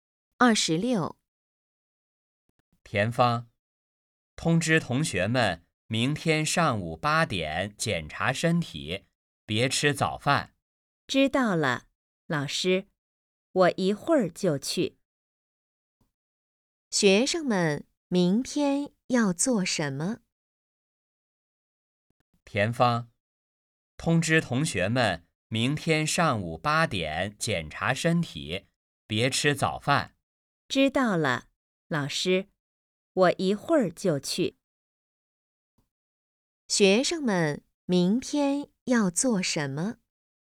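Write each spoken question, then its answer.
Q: 学生们明天要做什么?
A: 检查身体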